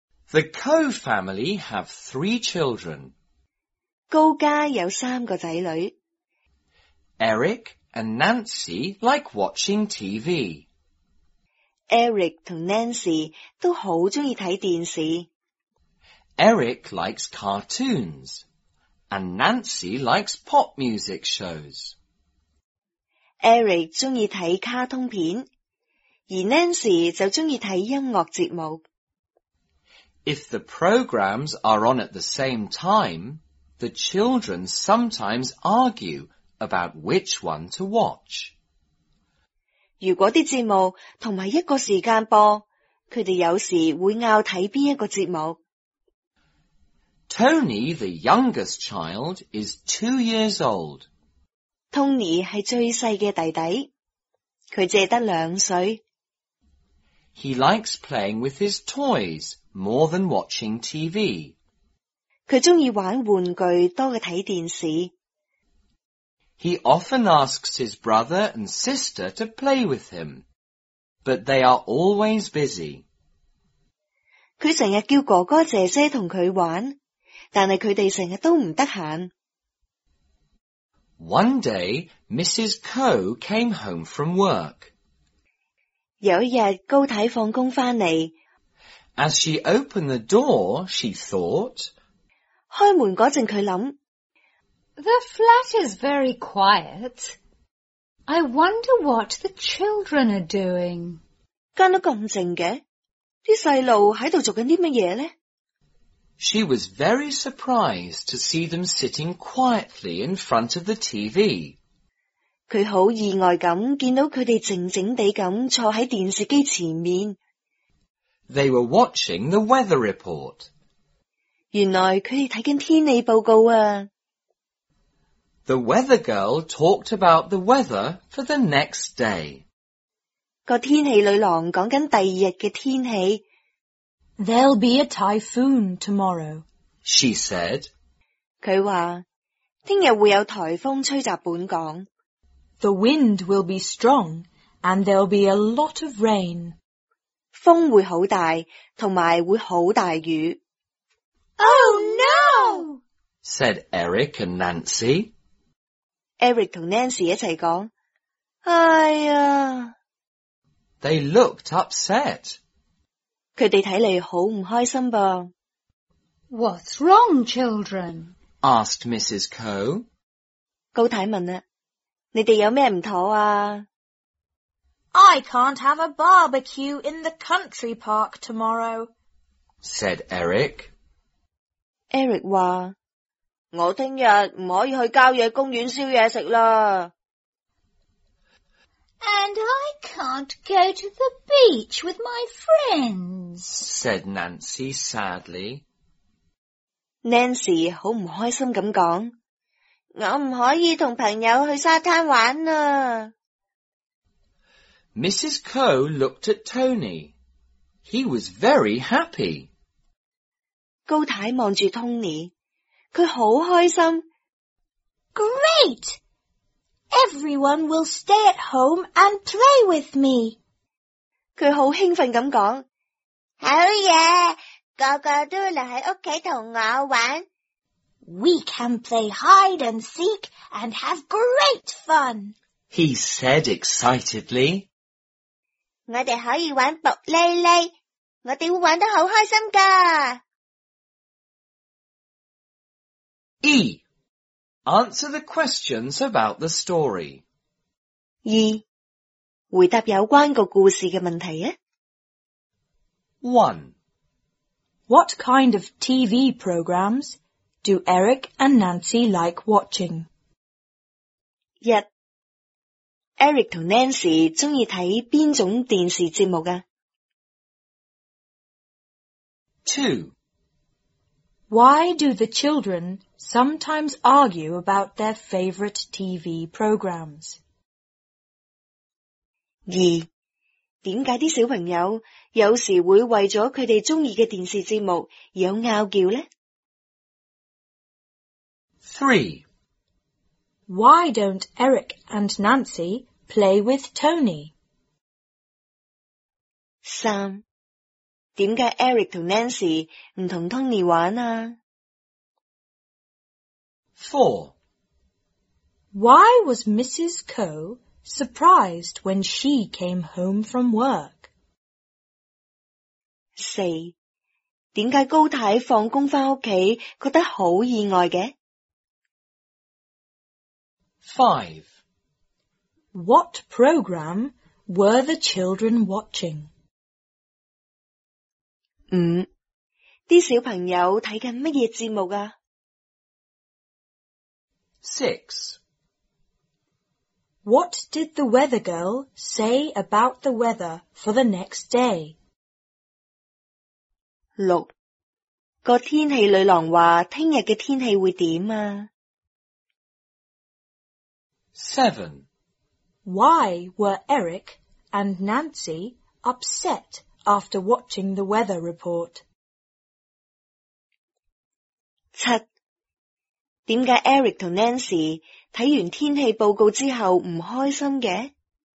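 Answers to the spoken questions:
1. Eric likes cartoons and Nancy likes pop music shows.
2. Because the programs are sometimes on at the same time.
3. Because they are always busy.
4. The flat was very quiet and the children were sitting quietly in front of the TV.
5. The weather report.
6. There would be a typhoon, with strong wind and a lot of rain.
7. Eric couldn't have a barbecue in the country park and Nancy couldn't go to the beach with her friends.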